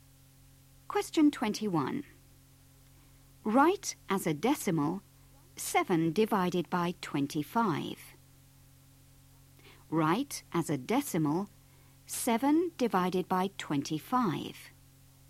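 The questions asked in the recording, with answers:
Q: Write as a decimal 7 divided by 25.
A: 0.28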